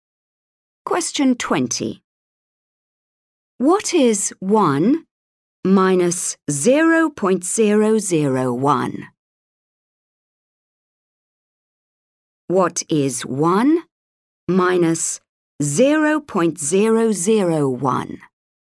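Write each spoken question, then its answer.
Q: What is 1 minus 0.001?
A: 0.999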